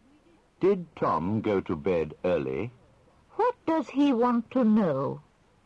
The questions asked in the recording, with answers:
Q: What does he want to know?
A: He wants to know if Tom went to bed early.